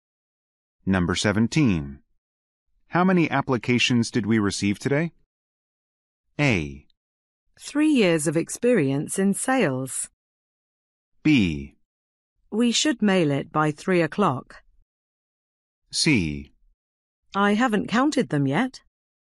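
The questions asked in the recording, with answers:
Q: How many applications did we receive today?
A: C: I haven't counted them yet.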